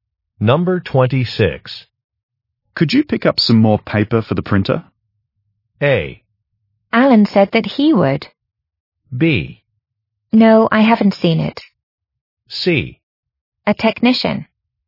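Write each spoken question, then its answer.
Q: Could you pick up some more paper for the printer?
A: A: Alan said that he would.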